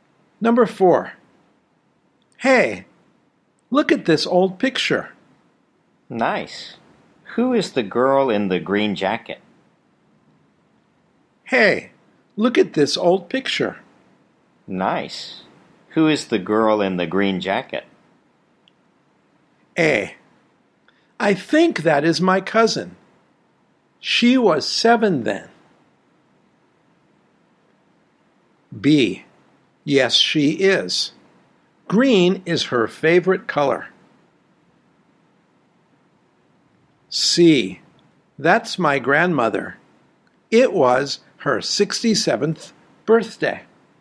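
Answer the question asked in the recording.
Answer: A: I think that is my cousin. She was 7 then.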